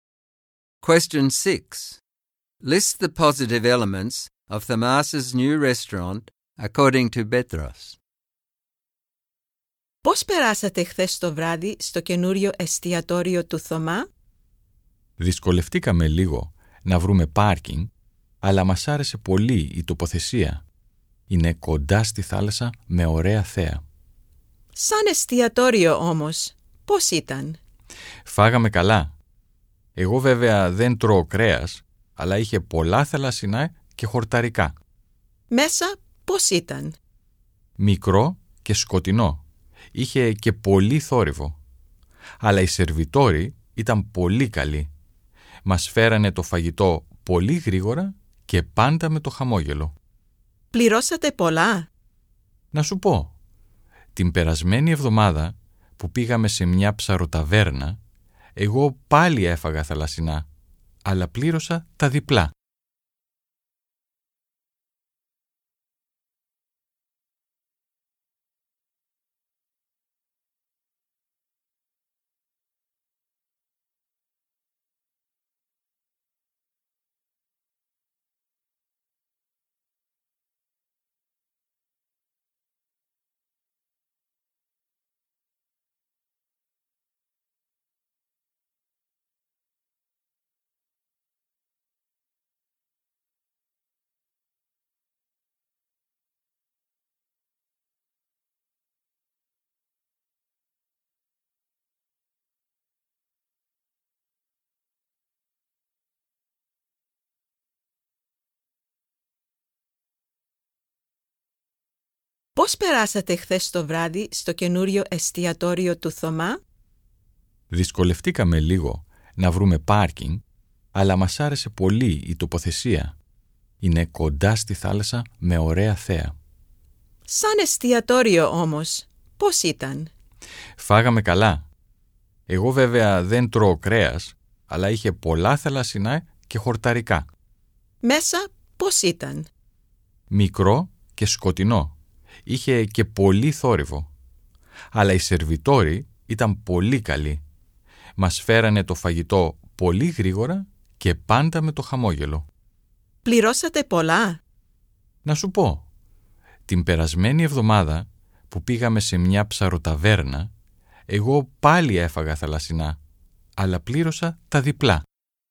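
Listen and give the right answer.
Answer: It is close to the sea with a nice view; the food was good, with lots of seafood and vegetable dishes; the waiters were very good, fast and always smiling; it was cheaper than a fish taverna, where he paid double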